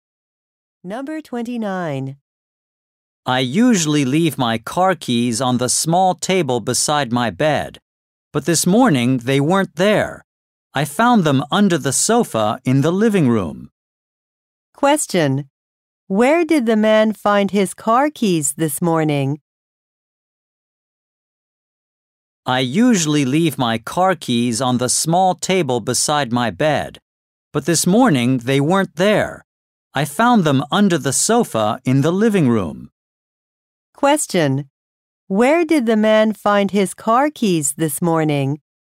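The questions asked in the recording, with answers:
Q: Where did the man find his car keys this morning?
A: Under the sofa in the living room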